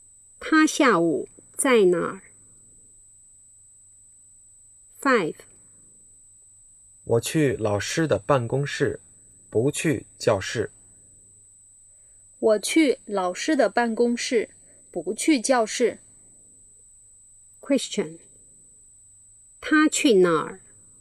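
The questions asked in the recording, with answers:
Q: 他去哪儿?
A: 老师的办公室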